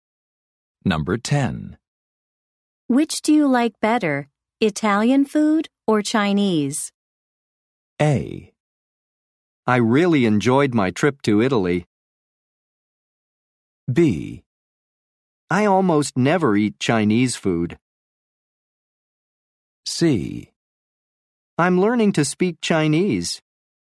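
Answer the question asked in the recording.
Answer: B: I almost never eat Chinese food.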